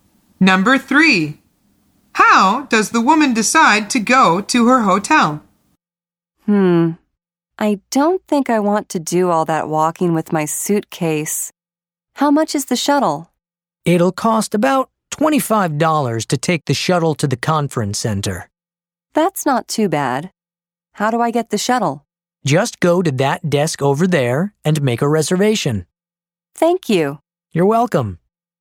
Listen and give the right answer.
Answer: The answer is by shuttle.